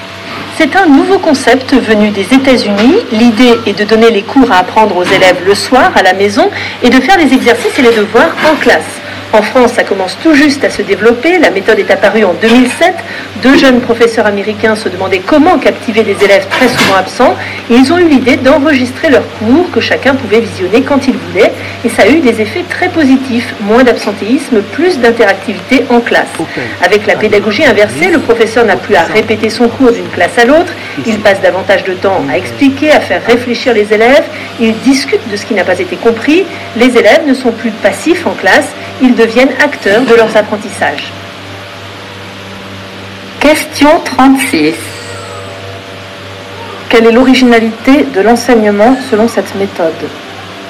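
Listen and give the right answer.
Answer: Les élèves étudient le cours le soir à la maison et font les exercices et les devoirs en classe.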